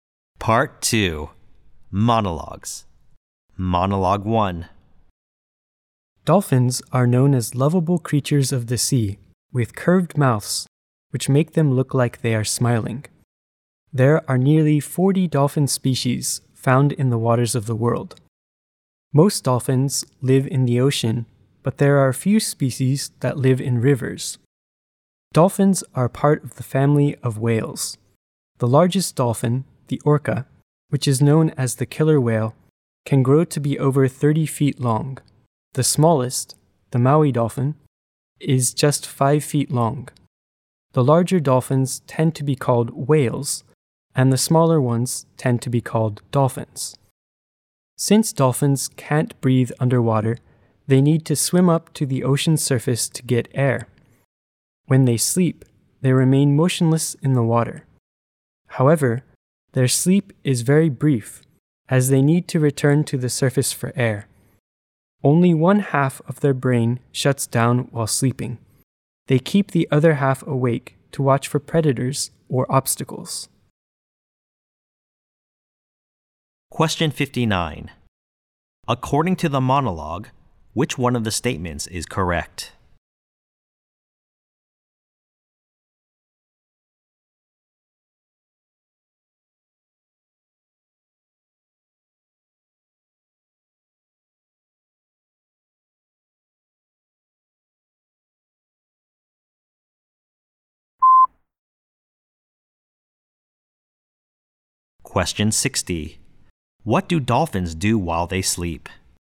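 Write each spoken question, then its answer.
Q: What do dolphins do while they sleep?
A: They stay motionless with half of the brain awake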